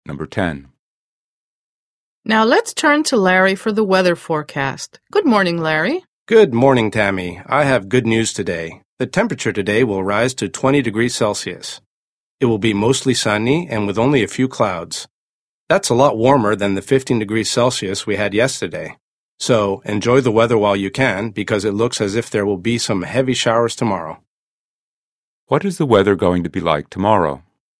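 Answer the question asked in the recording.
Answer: There will be heavy showers (rainy).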